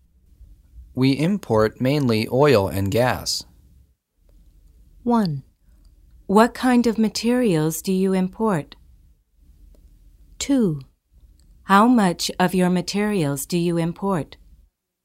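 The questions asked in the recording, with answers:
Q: We import mainly oil and gas.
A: 1: What kind of materials do you import?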